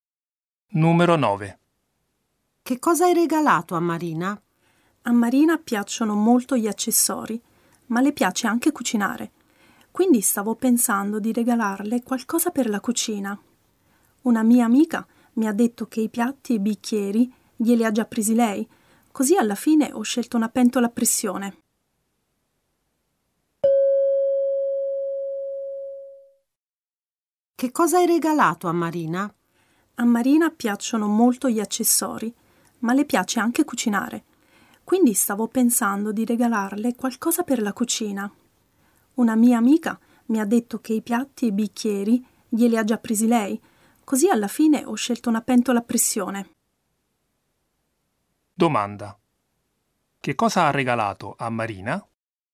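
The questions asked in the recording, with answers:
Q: che cosa ha regalato a Marina?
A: Una pentola a pressione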